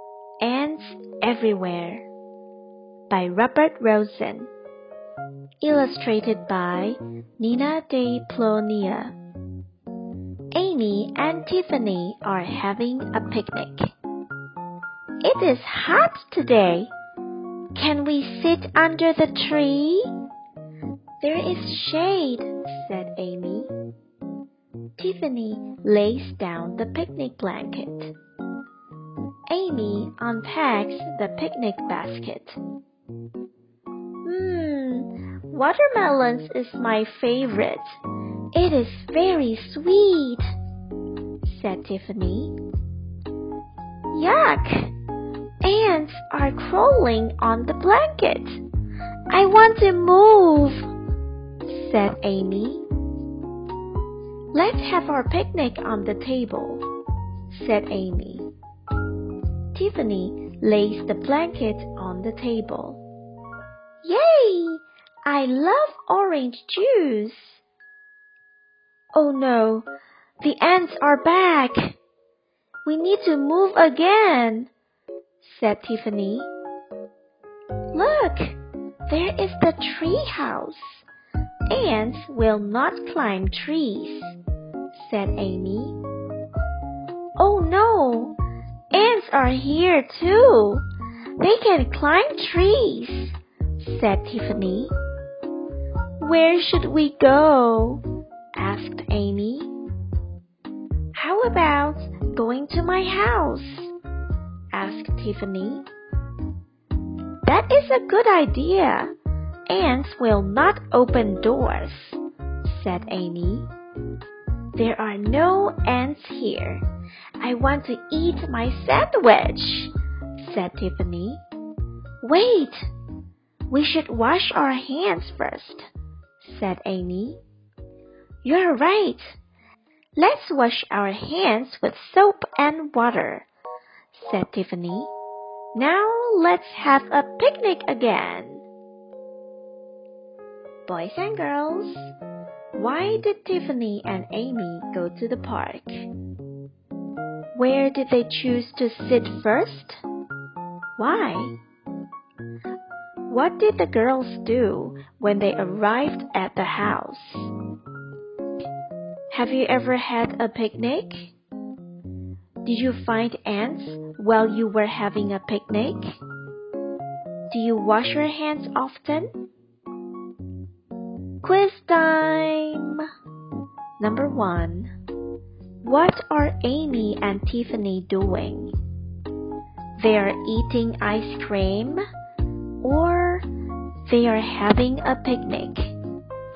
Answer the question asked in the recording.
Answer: That's right. They're having a picnic.